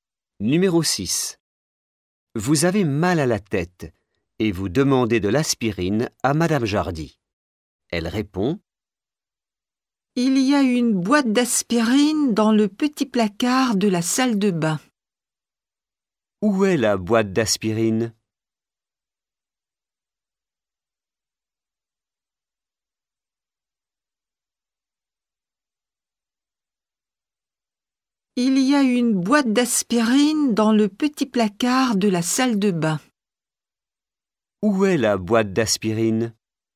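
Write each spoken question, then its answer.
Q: Où est la boîte d'aspirine ?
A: Dans le petit placard de la salle de bain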